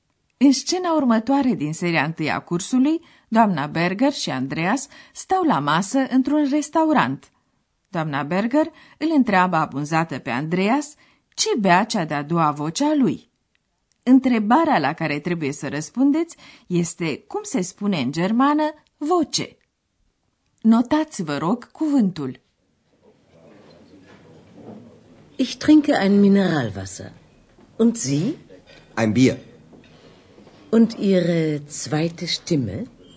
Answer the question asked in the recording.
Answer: Este Stimme.